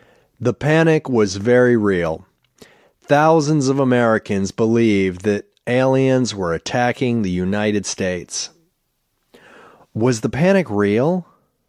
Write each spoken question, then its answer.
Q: Was the panic real?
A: Yes, the panic was very real.